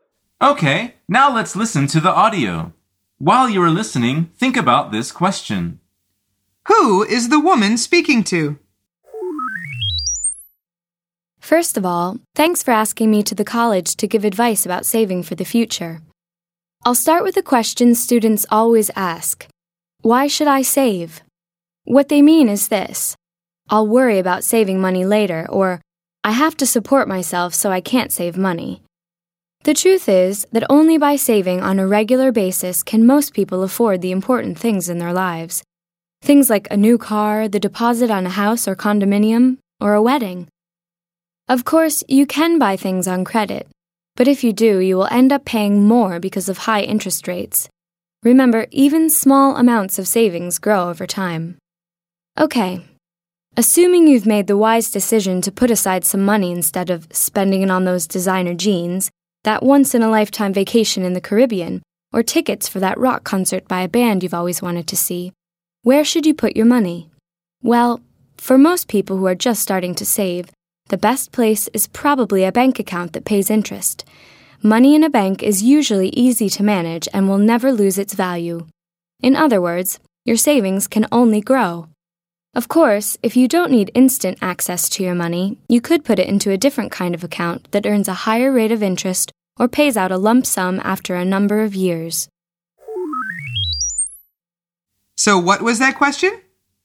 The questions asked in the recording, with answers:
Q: Who is the woman speaking to?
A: The answer is she's speaking to a group of students.